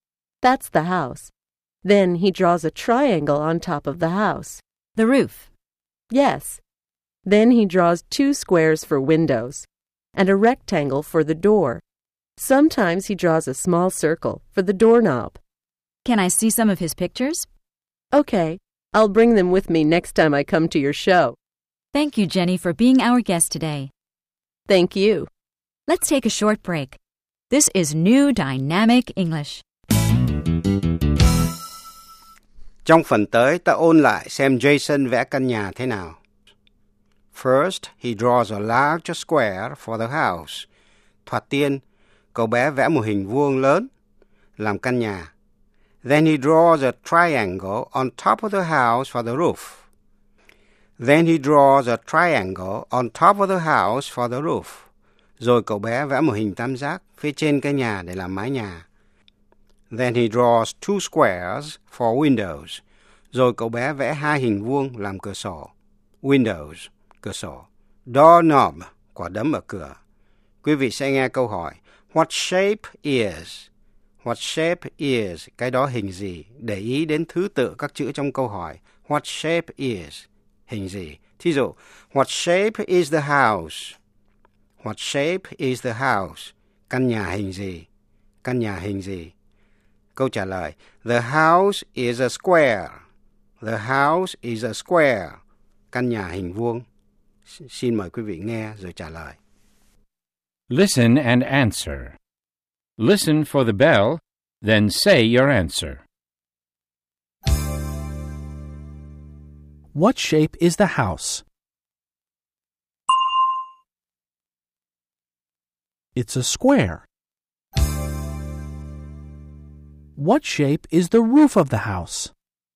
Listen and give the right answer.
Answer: It's a triangle.